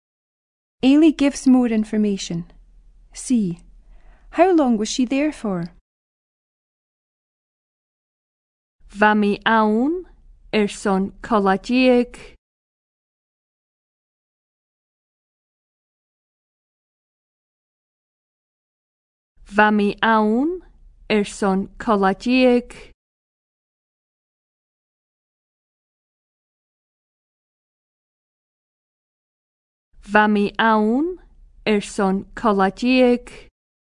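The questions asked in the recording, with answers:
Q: How long was she there for?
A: A fortnight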